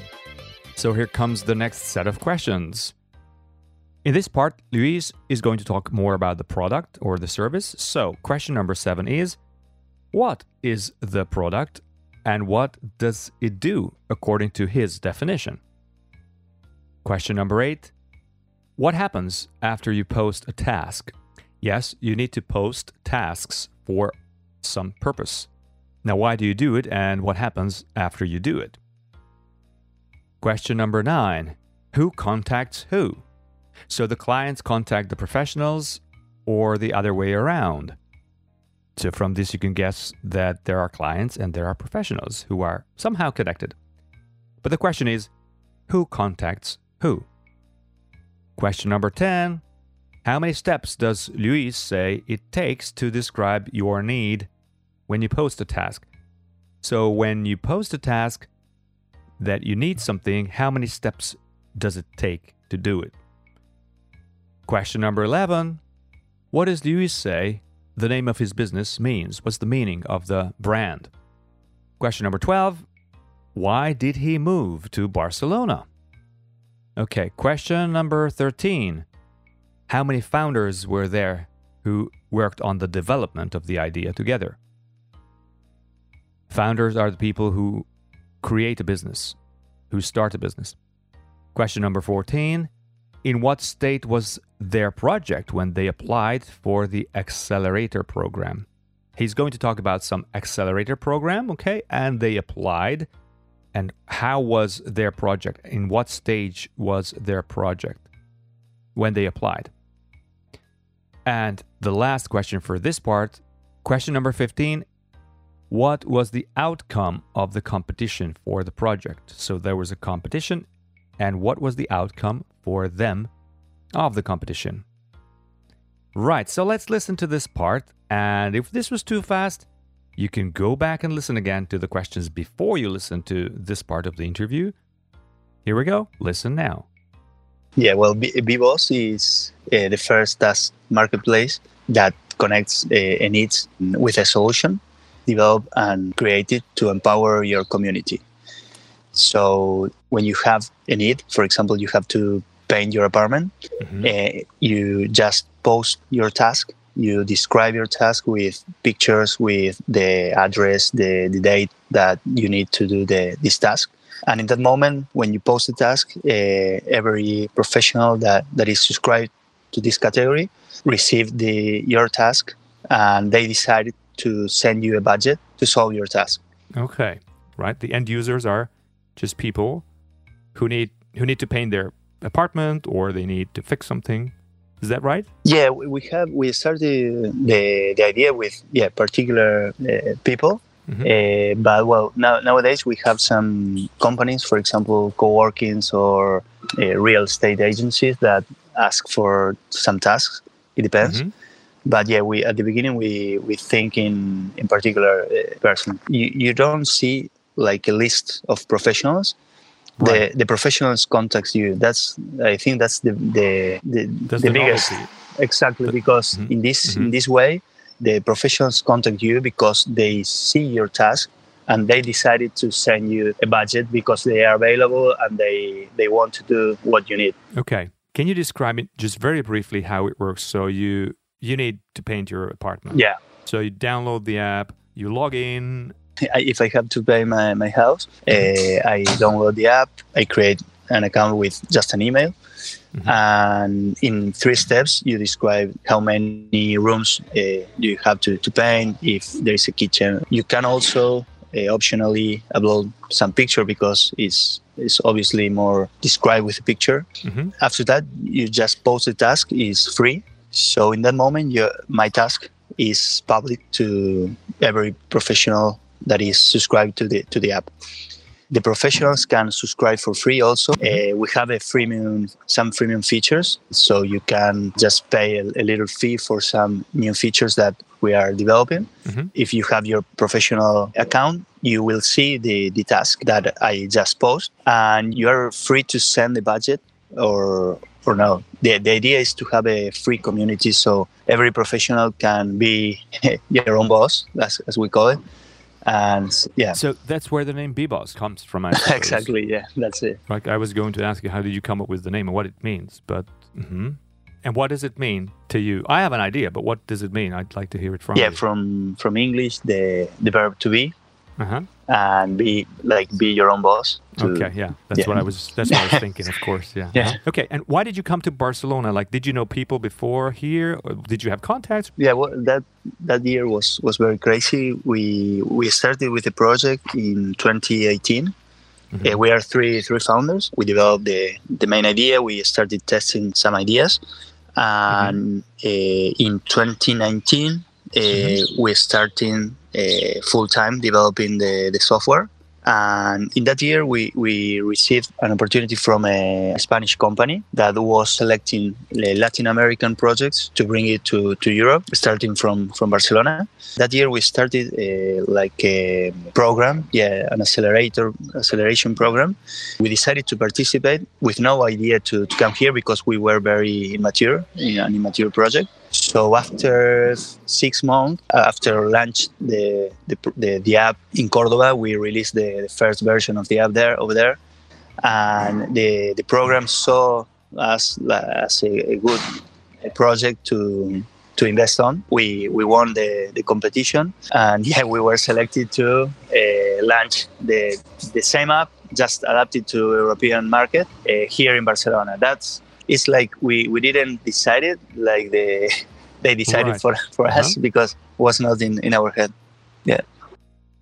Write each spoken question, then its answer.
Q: what is the product and what does it do according to his definition?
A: So it's an app, right? So the product is an application, which is a marketplace that connects people who need a service, and they're connected to professionals who can solve the problem or the need, creating a community of users and service providers.

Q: what happens after you post a task?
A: So you post a task, something you need to solve, and then the professionals who use the app will see what task you have posted and what you need to solve, and they can contact you after that.

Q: who contacts who?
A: The professionals contact you.

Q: how many steps does Luis say it takes to describe your need when you post a task?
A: Well, there are 3 steps that Lewis mentions.

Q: what does Luis say the name of his business means?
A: Well, it means be your own boss, according to Lewis, his definition.

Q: why did he move to Barcelona?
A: Well, he moved to Barcelona to set up the business here and to start the business here, adapting it to local needs.

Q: how many founders were there who worked on the development of the idea together?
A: There were 3 founders who developed the idea, and then they applied for an accelerator program.

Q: in what state was their project when they applied for the accelerator program?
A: And he says it was quite immature, so it wasn't a finished project.

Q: what was the outcome of the competition for the project?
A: Well, they won the competition.